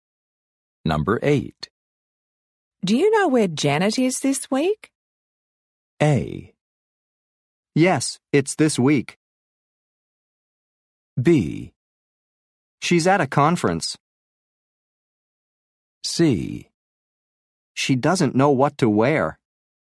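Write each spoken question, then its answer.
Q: Do you know where Janet is this week?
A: B: She's at a conference.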